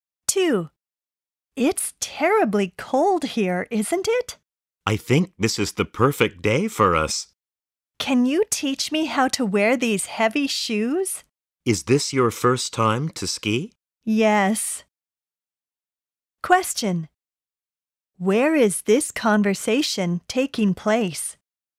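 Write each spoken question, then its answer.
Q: Where is this conversation taking place?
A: At a ski resort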